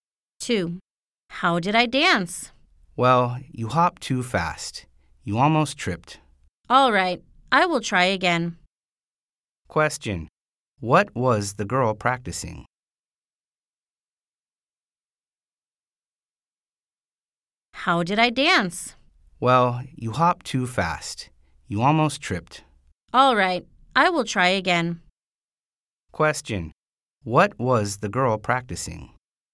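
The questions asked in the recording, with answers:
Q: what was the girl practicing?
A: dancing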